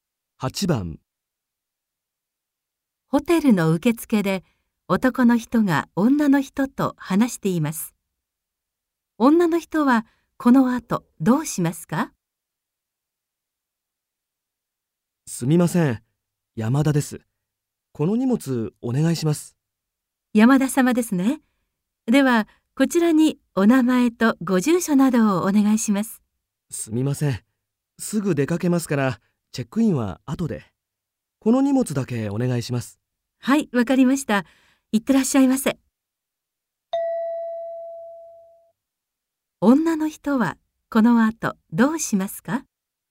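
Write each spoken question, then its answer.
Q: 女の人はこの後どうしますか?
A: 荷物を預けてすぐ出かける(チェックインは後で)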